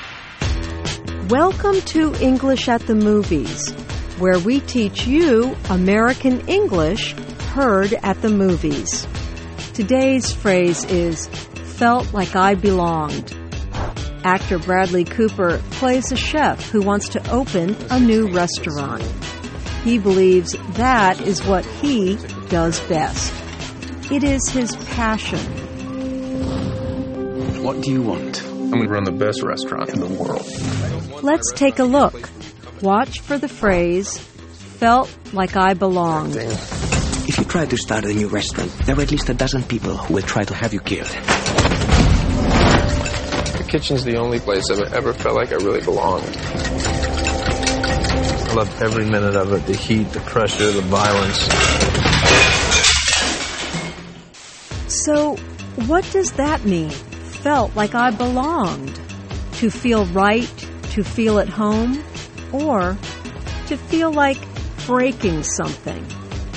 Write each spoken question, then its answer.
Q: So, what does that mean? Felt like I belonged.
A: Felt like I belonged means that a person feels like part of a group.